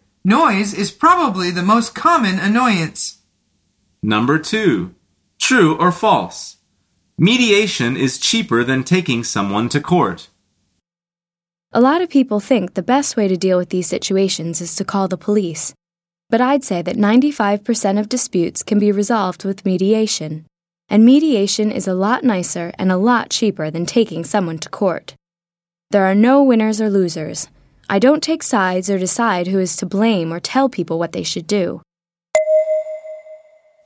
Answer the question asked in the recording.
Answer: The answer is true.